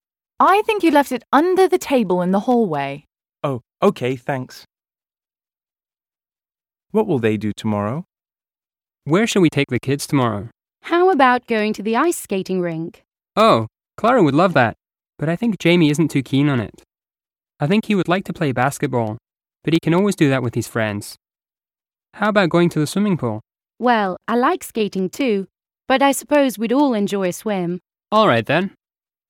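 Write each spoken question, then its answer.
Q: What will they do tomorrow?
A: Go swimming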